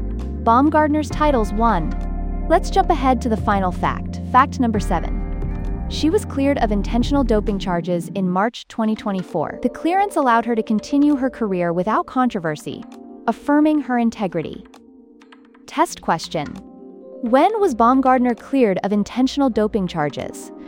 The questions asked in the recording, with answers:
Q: When was Baumgardner cleared of intentional doping charges?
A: March 2024.